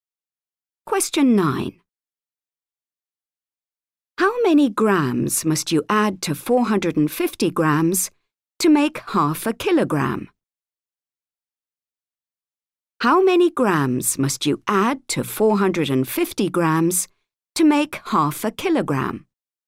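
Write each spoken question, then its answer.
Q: How many grams must you add to 450 grams to make 0.5 kilogram?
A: 50 grams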